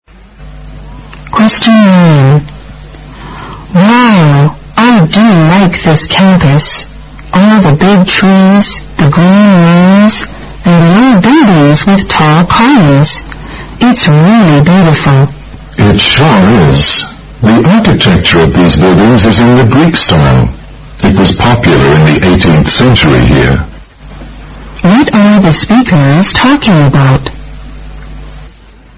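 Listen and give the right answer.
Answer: The campus and its Greek-style architecture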